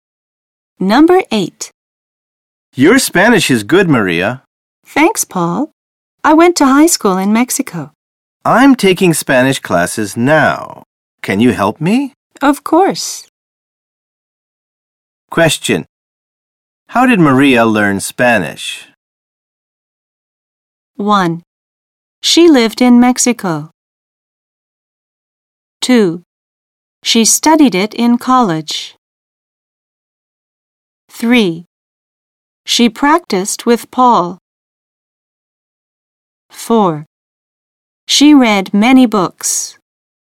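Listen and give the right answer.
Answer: 1: She lived in Mexico.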